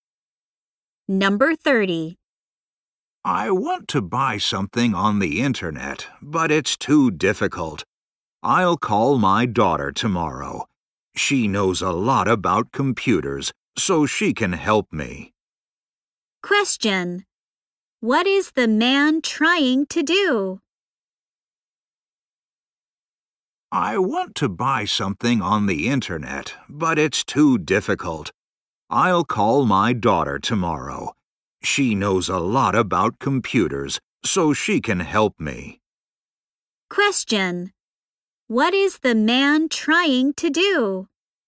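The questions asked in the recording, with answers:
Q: What is the man trying to do?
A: Buy something on the internet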